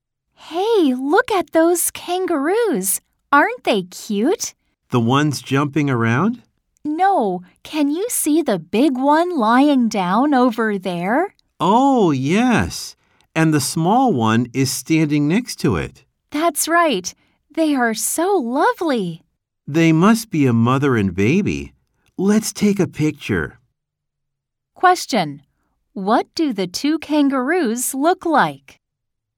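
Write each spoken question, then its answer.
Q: What do the two kangaroos look like?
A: The big one is lying down and the small one is standing next to it.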